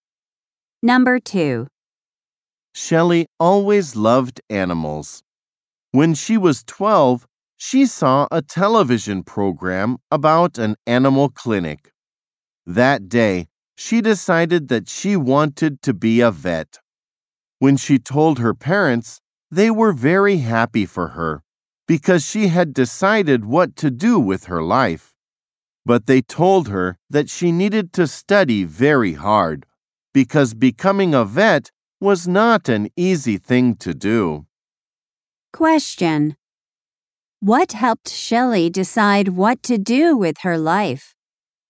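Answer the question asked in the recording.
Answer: A TV program about an animal clinic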